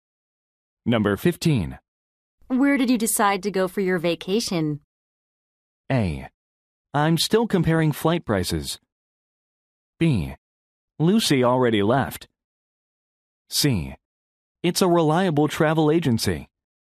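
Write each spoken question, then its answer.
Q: Where did you decide to go for your vacation?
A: A: I'm still comparing flight prices.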